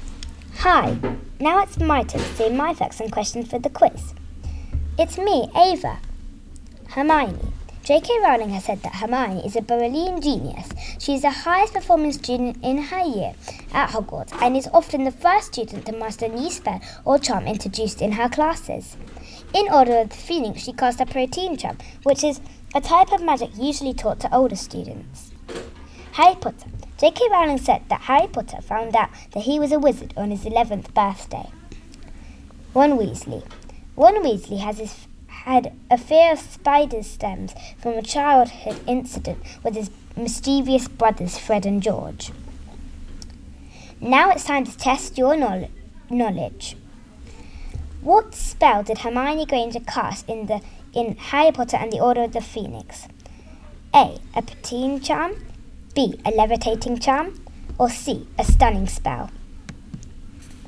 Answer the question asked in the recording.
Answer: The answer is A. Protein charm.